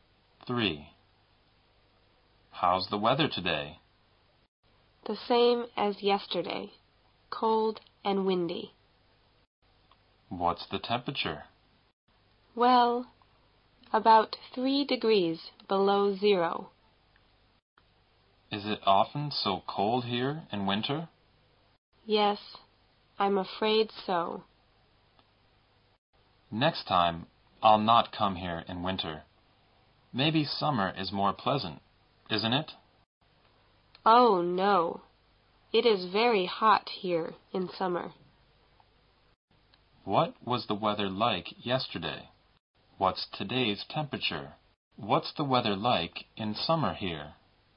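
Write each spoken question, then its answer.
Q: What was the weather like yesterday?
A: Cold and windy

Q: What's today's temperature?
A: About 3 degrees below zero

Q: What's the weather like in summer here?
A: Very hot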